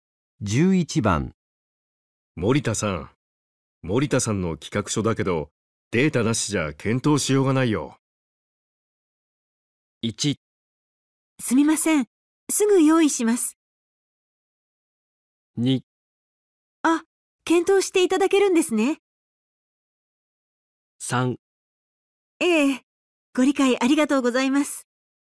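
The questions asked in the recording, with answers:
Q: 森田さん森田さんの企画書だけどデータなしじゃ検討しようがないよ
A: 1: すみませんすぐ用意します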